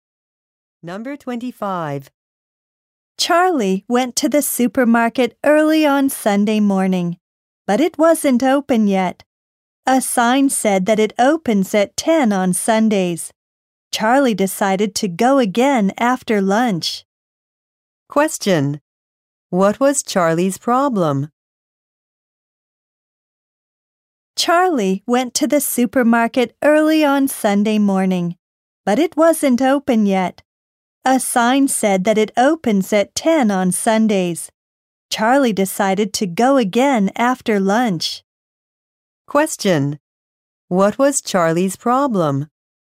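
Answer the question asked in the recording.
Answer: The supermarket wasn't open yet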